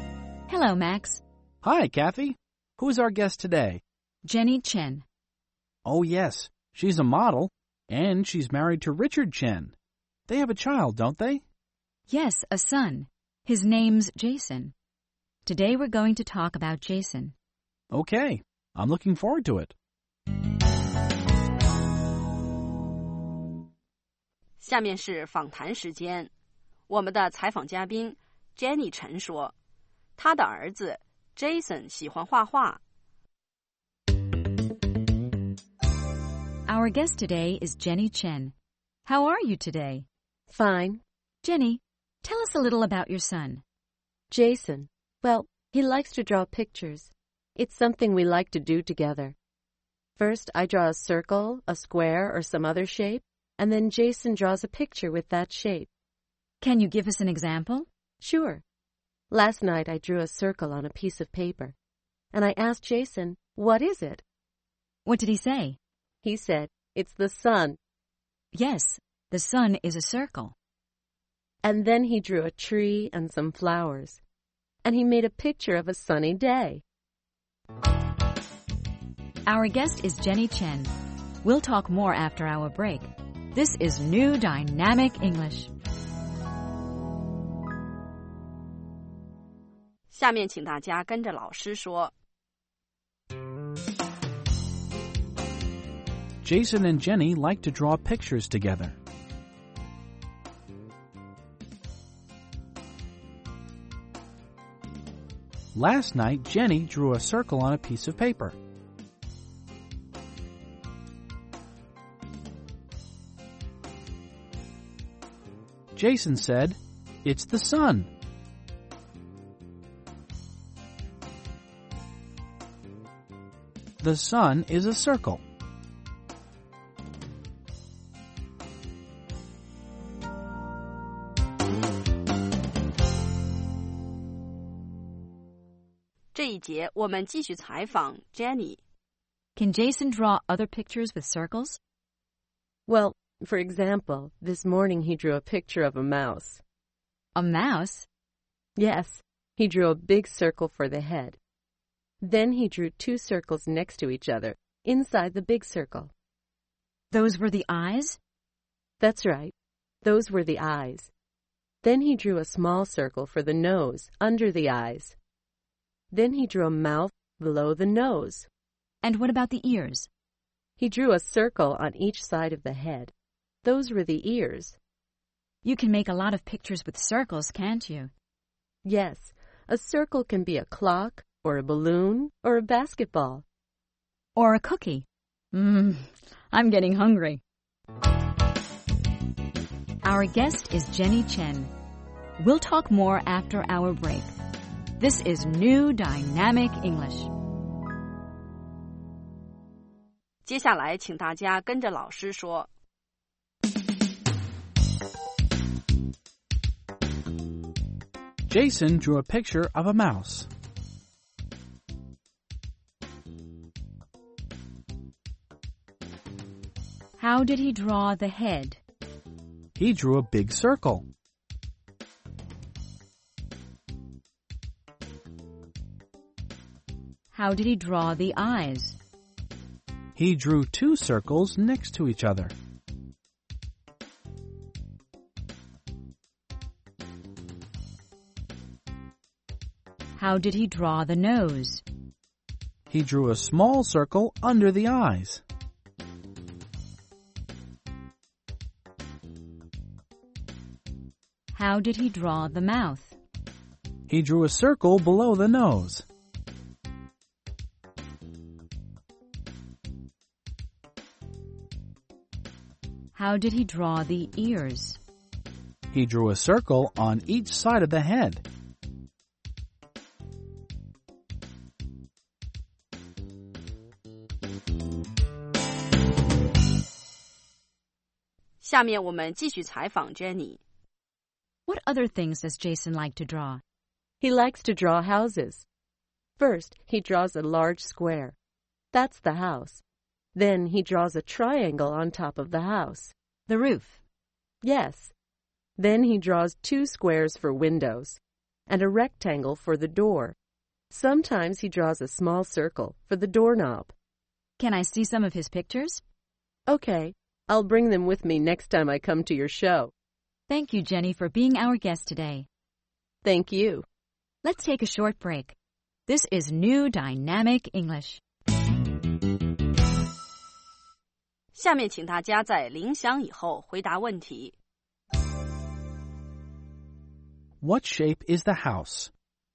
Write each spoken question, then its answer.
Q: What shape is the house?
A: It's a square.